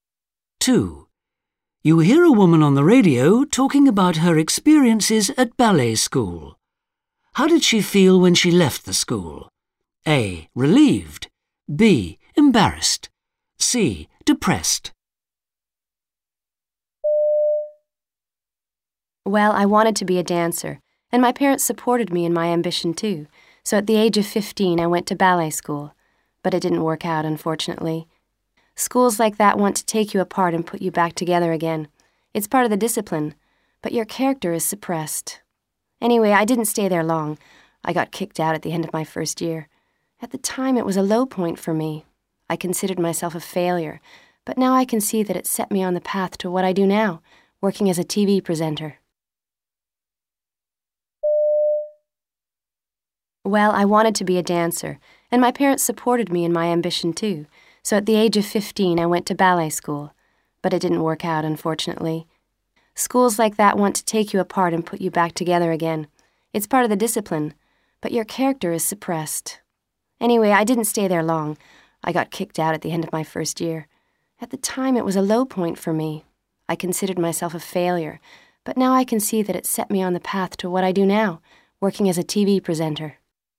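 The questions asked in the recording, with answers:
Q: How did she feel when she left the school?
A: C: Depressed.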